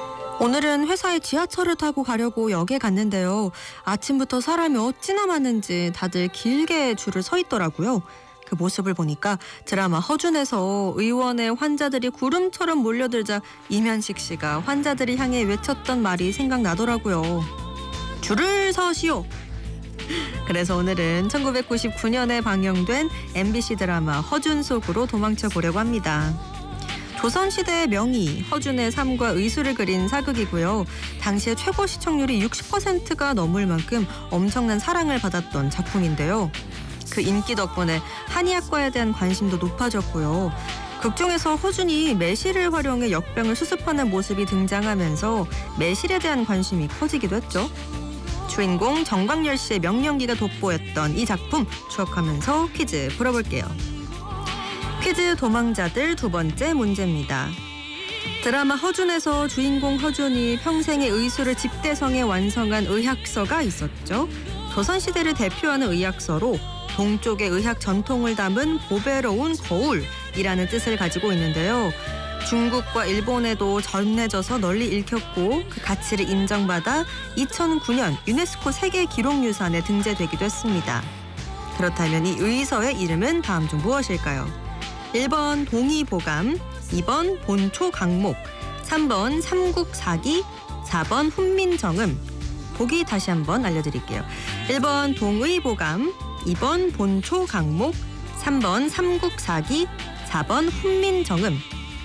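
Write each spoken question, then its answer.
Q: 그렇다면 이 의서의 이름은 다음 중 무엇일까요?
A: 1: 동의보감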